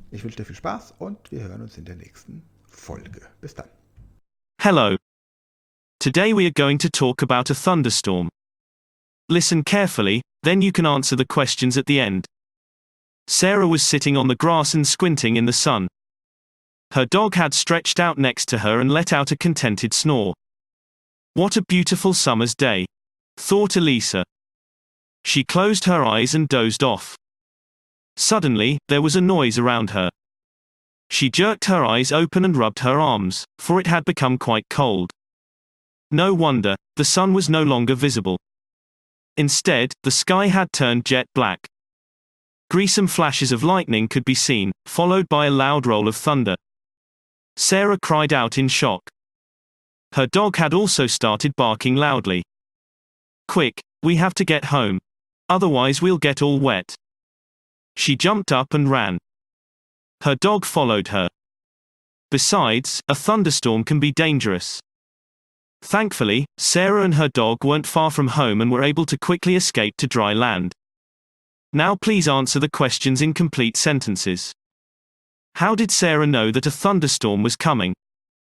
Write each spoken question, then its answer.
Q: How did Sarah know that a thunderstorm was coming?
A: she realized that a thunderstorm was coming because it suddenly became loud and cold around her.